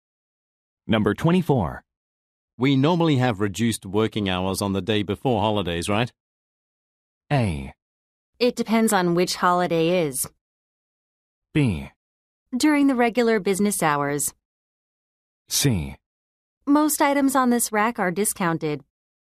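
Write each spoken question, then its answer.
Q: We normally have reduced working hours on the day before holidays, right?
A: A: It depends on which holiday is.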